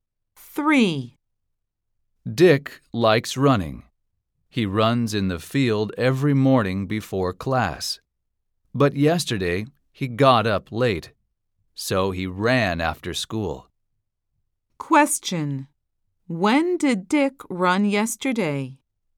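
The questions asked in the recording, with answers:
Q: When did Dick run yesterday?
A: After school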